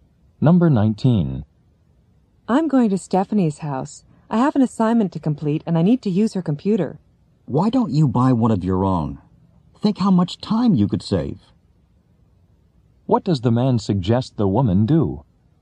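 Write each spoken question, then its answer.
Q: What does the man suggest the woman do?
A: Buy her own computer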